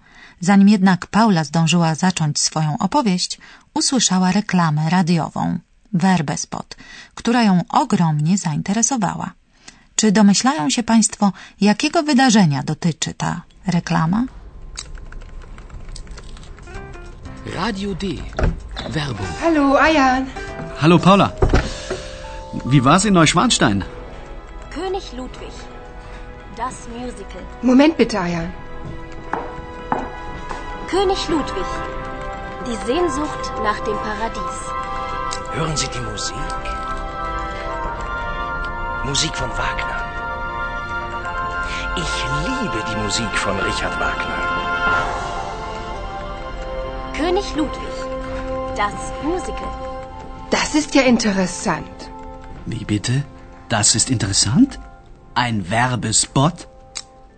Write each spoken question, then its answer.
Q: Czy domyślają się Państwo, jakiego wydarzenia dotyczy ta reklama?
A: Reklama zachęca do obejrzenia muzykalu o życiu i śmierci króla Ludwiga II